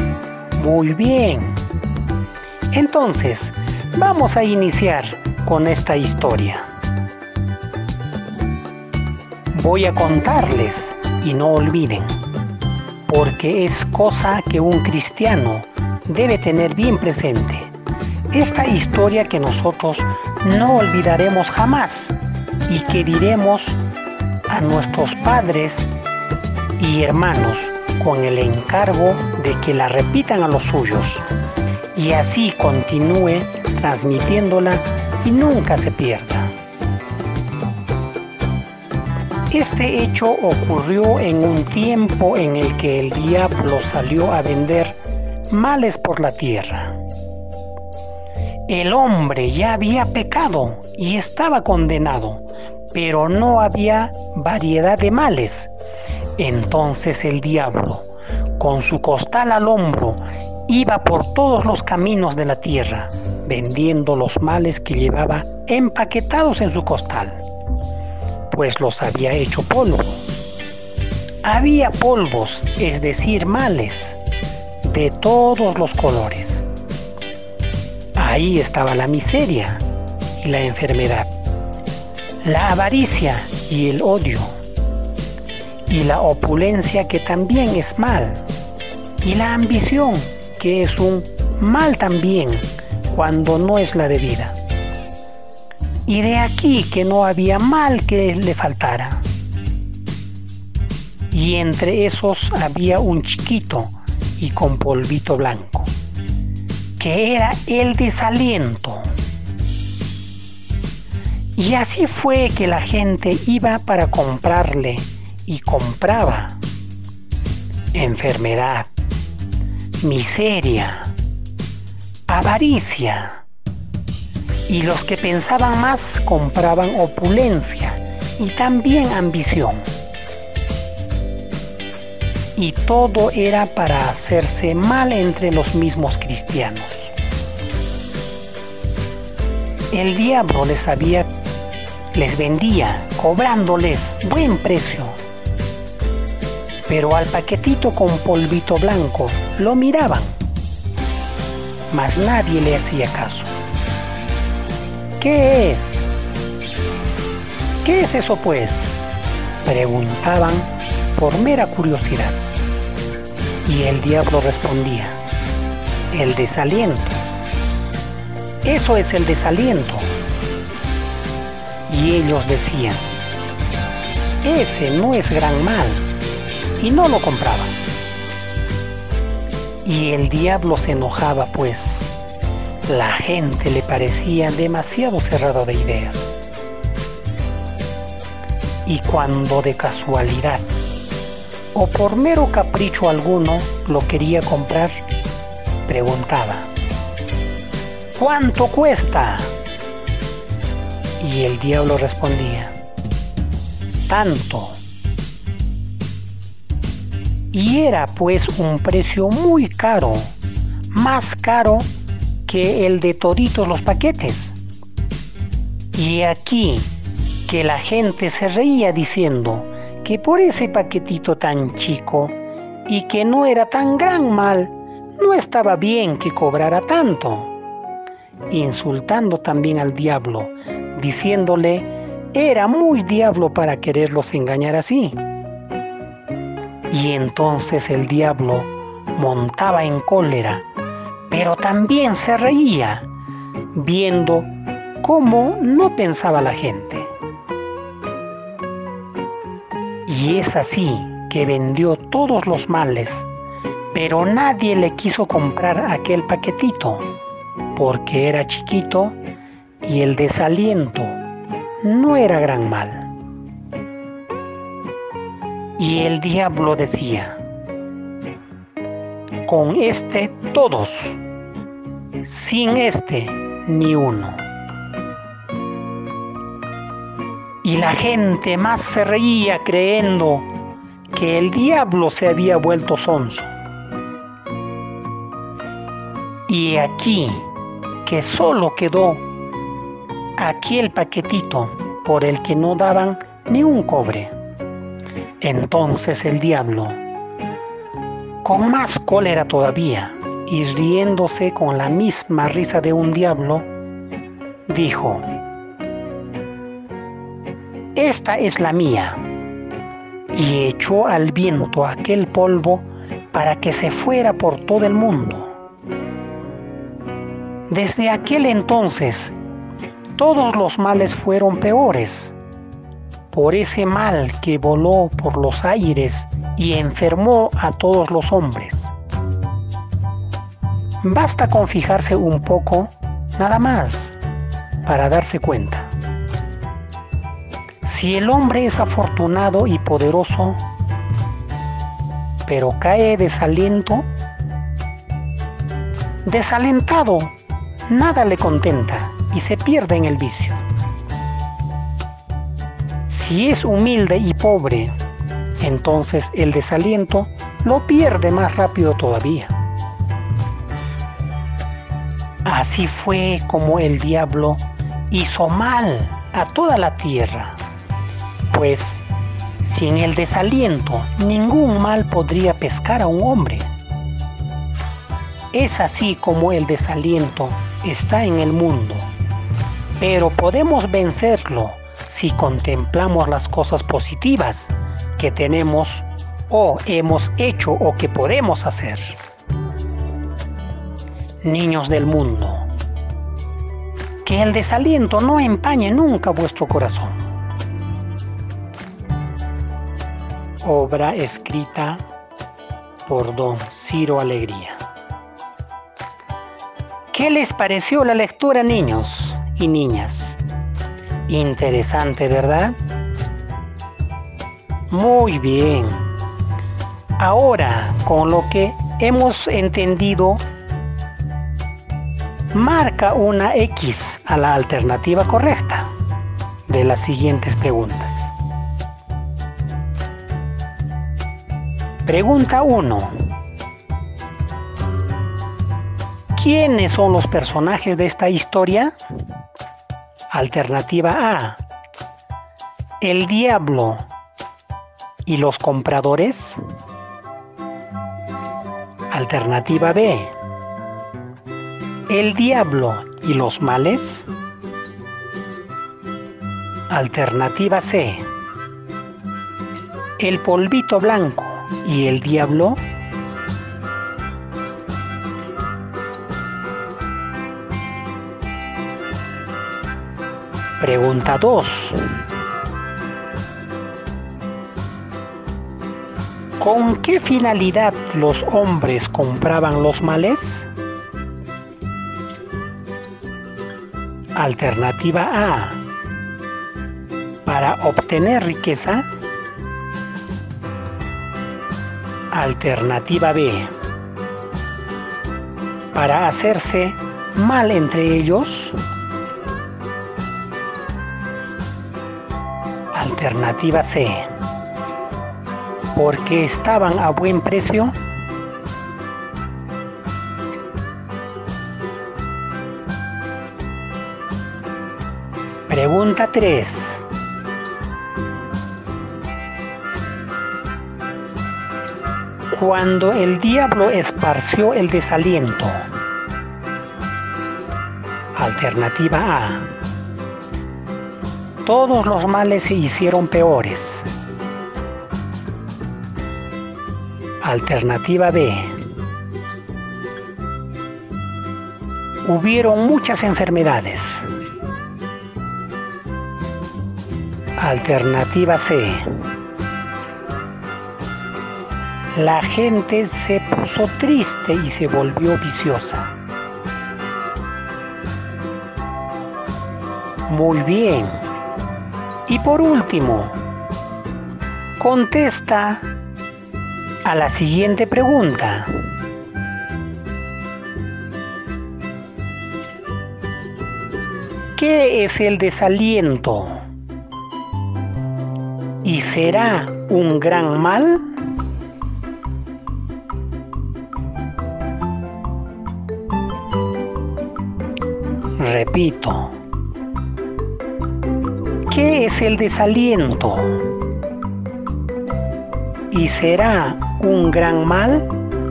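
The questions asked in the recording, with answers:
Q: ¿Quiénes son los personajes de esta historia?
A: A: el diablo y los compradores

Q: ¿Con qué finalidad los hombres compraban los males?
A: B: Para hacerse mal entre ellos

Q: Cuando el diablo esparció el desaliento.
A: A: Todos los males se hicieron peores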